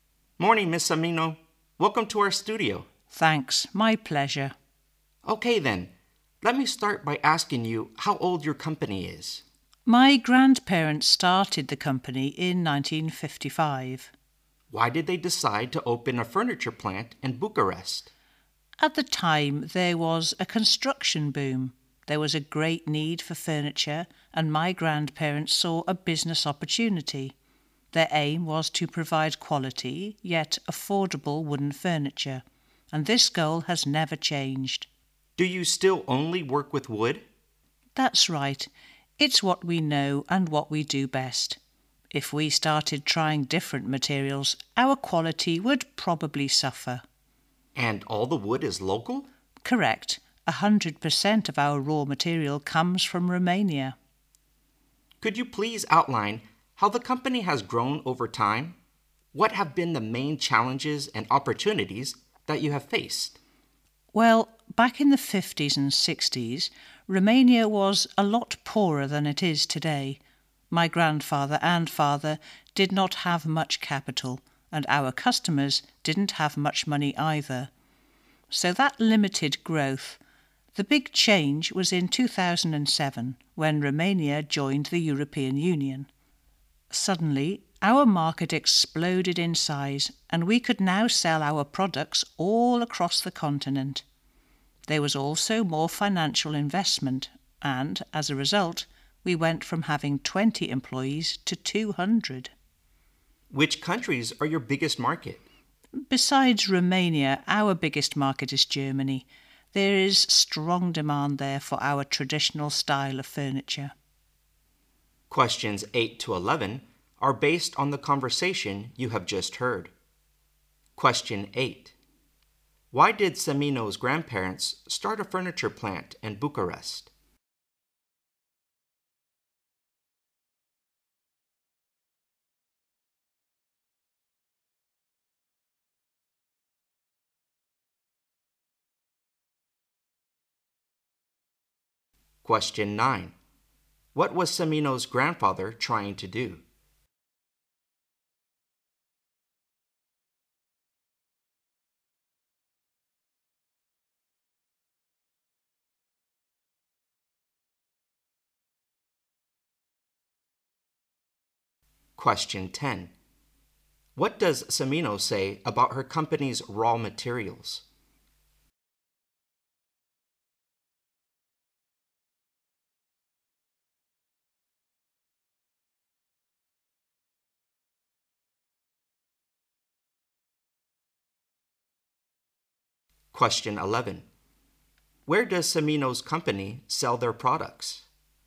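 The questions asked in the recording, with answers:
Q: Why did Semino's grandparents start a furniture plant in Bucharest?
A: There was a construction boom and a great need for furniture.

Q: What was Cimino's grandfather trying to do?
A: Provide quality yet affordable wooden furniture.

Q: What does Cimino say about her company's raw materials?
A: All of the wood comes from Romania.

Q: Where does Cimino's company sell their products?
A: Across Europe, mainly Romania and Germany.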